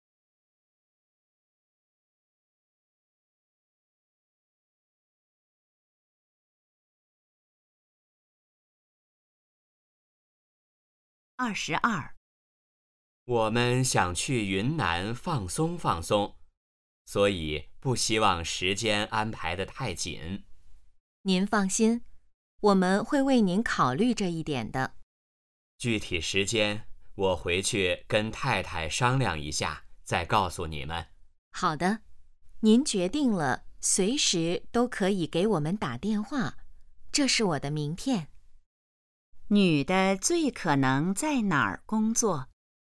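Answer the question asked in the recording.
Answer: 旅行社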